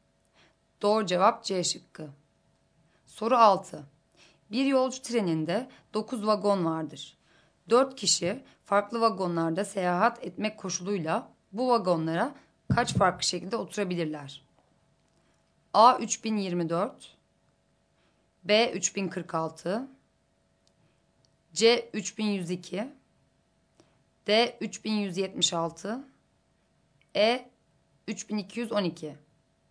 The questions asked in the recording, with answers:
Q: 4 kişi farklı vagonlarda seyahat etmek koşuluyla bu vagonlara kaç farklı şekilde oturabilirler?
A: Doğru cevap A şıkkı.